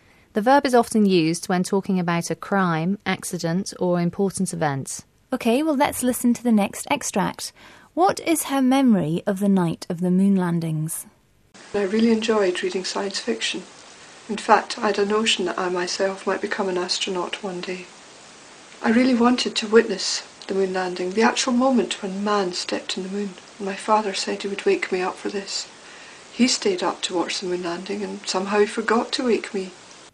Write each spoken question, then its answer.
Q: What is her memory of the night of the moon landings?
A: but unfortunately her father forgot to wake her up, so she missed the whole thing, poor girl.